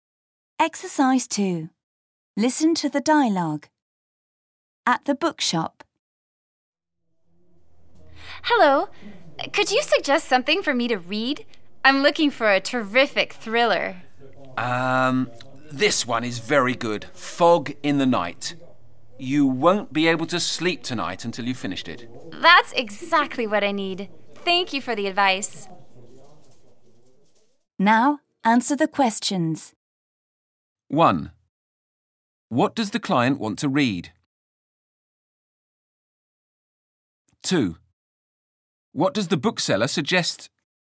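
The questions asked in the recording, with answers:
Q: What does the client want to read?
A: A terrific thriller

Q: What does the bookseller suggest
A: Fog in the Night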